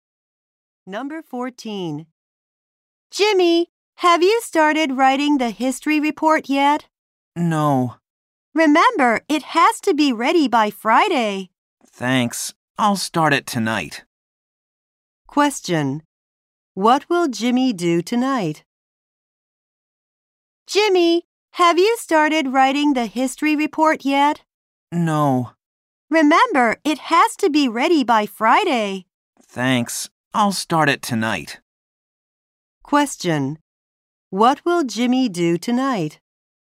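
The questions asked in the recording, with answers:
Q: What will Jimmy do tonight?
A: Start writing his history report.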